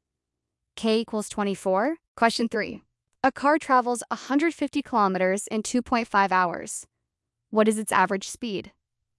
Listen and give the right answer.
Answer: 150 divided by 2.5 equals 60 kilometers per hour.